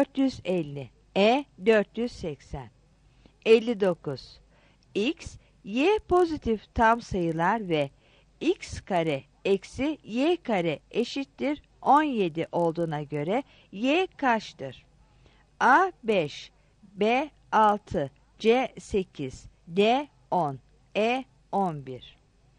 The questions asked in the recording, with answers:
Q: X, Y pozitif tam sayılar ve X kare eksi Y kare eşittir 17 olduğuna göre Y kaçtır?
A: 59 C